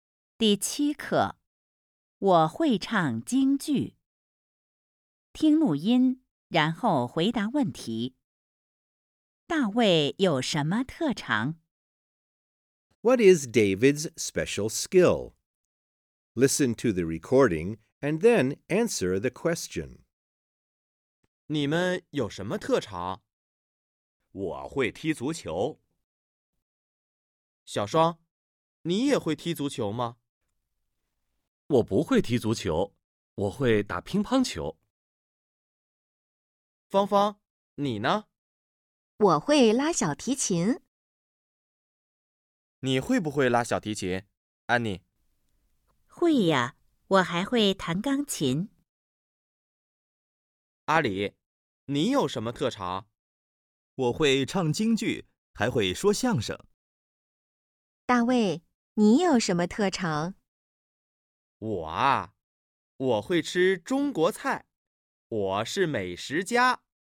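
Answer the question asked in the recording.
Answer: 他会吃中国菜,他是美食家。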